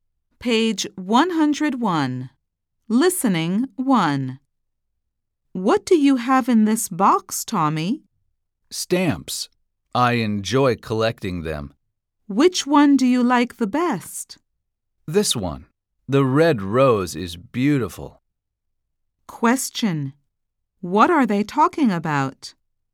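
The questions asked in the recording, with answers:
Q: What are they talking about?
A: Stamps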